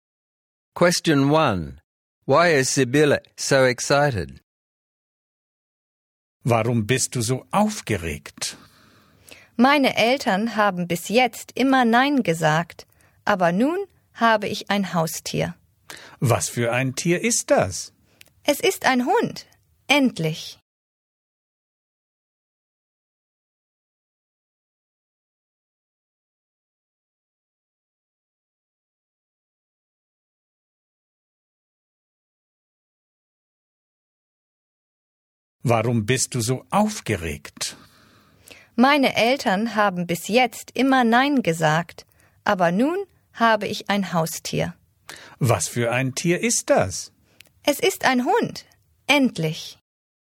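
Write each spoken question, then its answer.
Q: Why is Sibylle so excited?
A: She finally has a pet, a dog; her parents always said no before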